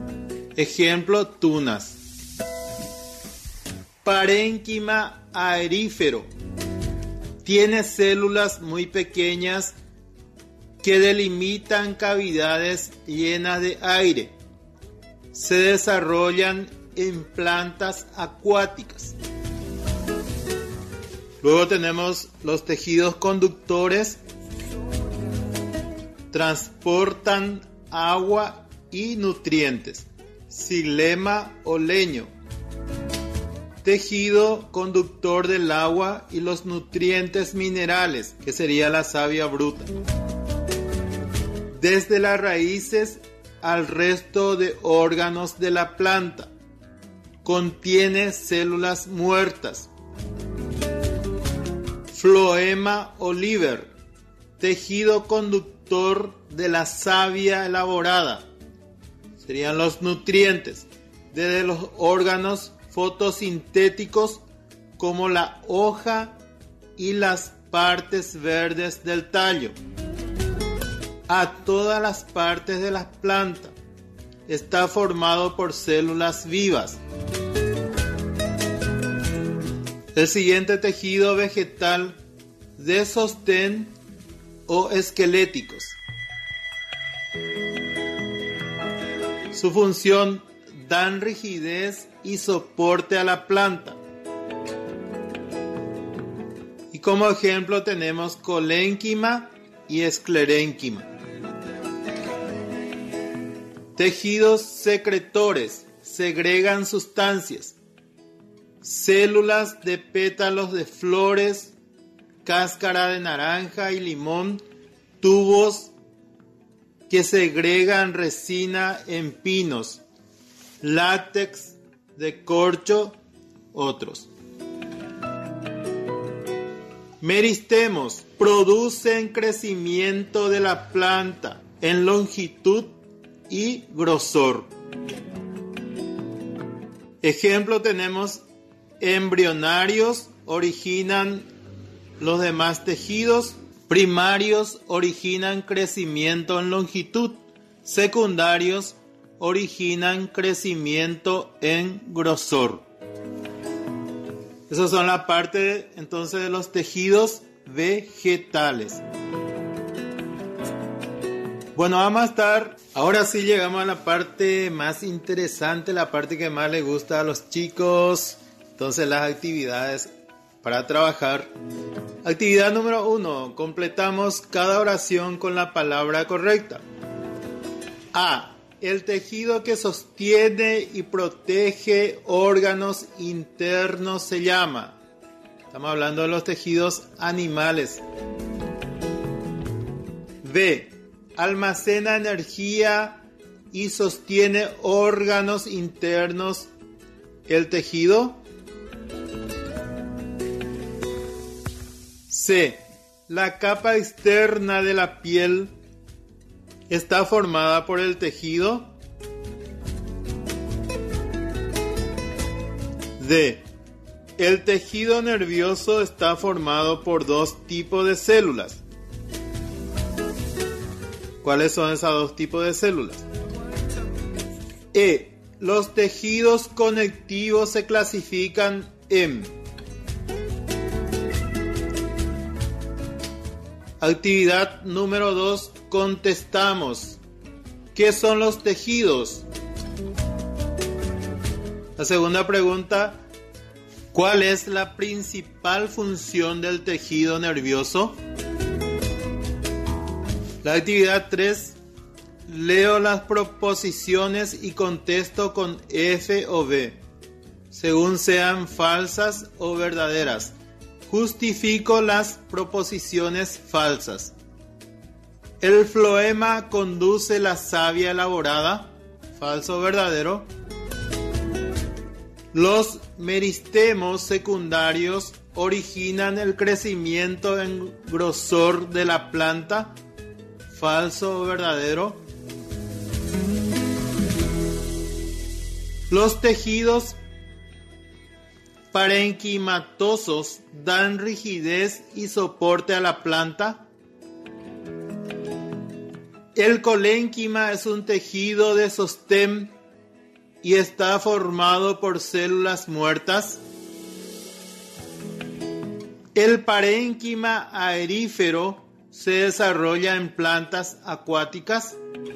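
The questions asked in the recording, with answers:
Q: El floema conduce la savia elaborada.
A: Verdadero

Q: Los meristemos secundarios originan el crecimiento en grosor de la planta.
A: Verdadero

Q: Los tejidos parenquimatosos dan rigidez y soporte a la planta.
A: Falso

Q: El parénquima aerífero se desarrolla en plantas acuáticas.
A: Verdadero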